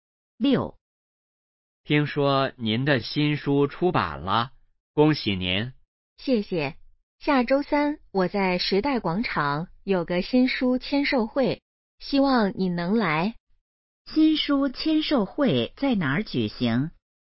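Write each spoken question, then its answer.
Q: 新书签售会在哪儿举行?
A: 时代广场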